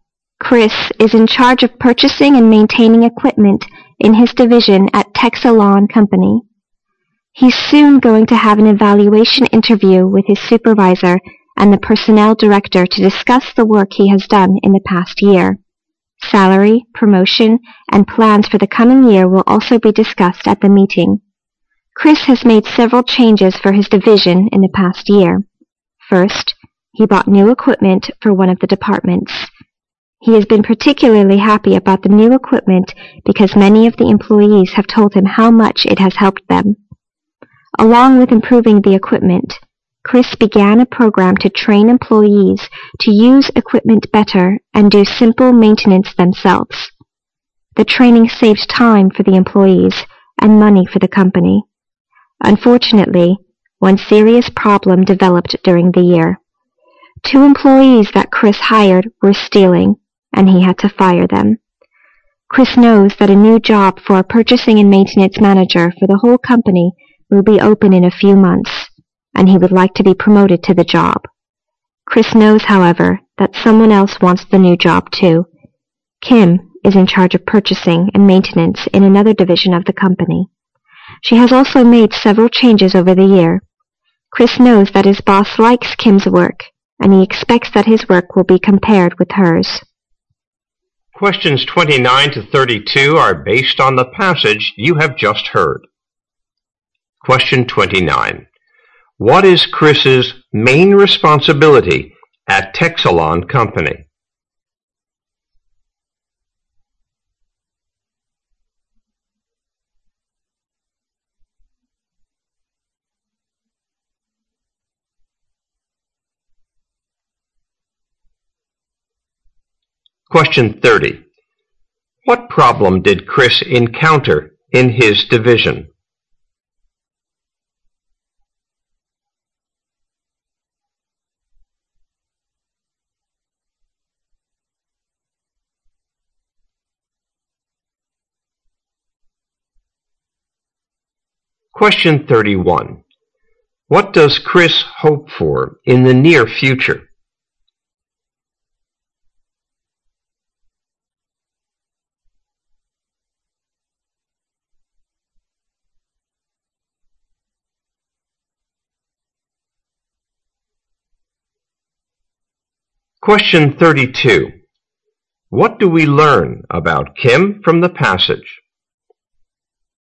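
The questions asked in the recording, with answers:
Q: What is Chris's main responsibility at Texalawn Company?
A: Purchasing and maintaining equipment in his division

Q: What problem did Chris encounter in his division?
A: Two employees he hired were stealing, so he had to fire them

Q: What does Chris hope for in the near future?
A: To be promoted to purchasing and maintenance manager for the whole company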